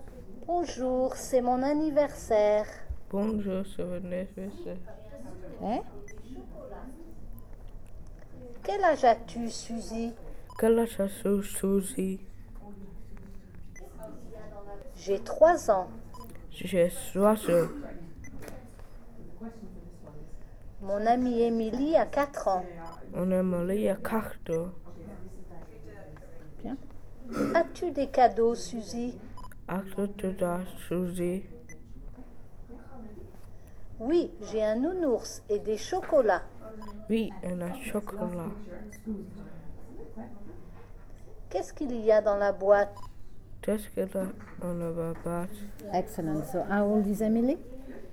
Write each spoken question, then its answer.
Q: So, how old is Emily?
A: Non, Emily a 4 ans.